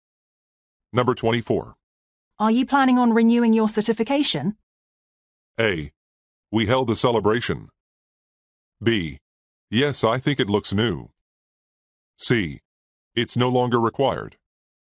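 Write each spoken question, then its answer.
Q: Are you planning on renewing your certification?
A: C: It's no longer required.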